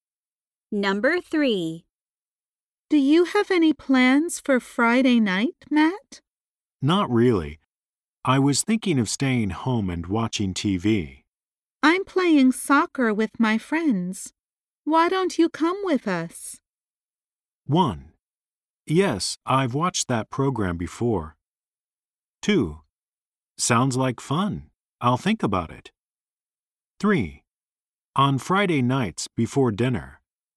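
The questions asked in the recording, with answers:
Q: Why don't you come with us?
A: 2: Sounds like fun. I'll think about it.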